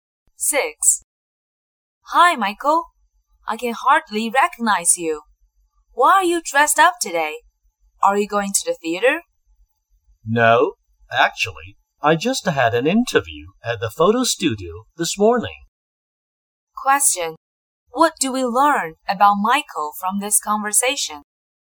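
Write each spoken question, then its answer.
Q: What do we learn about Michael from this conversation?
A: He had an interview at a photo studio that morning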